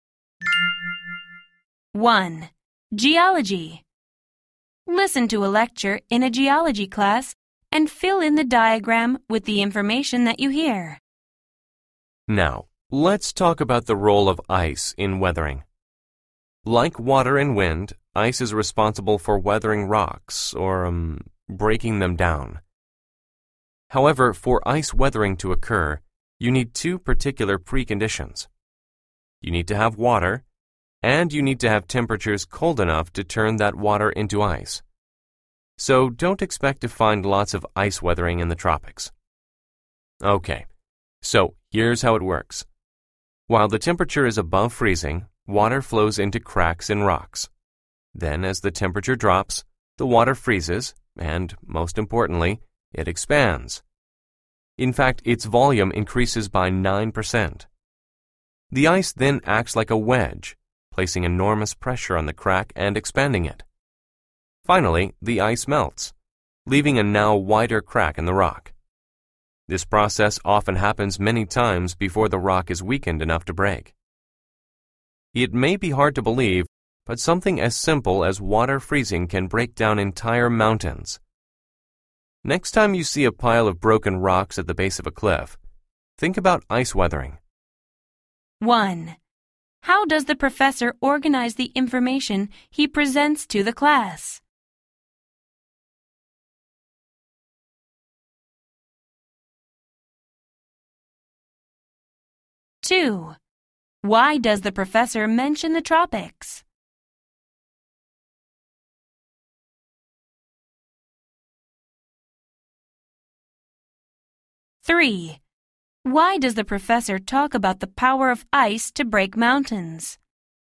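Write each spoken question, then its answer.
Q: Why does the professor mention the tropics?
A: It is too warm there for water to freeze, so there is little ice weathering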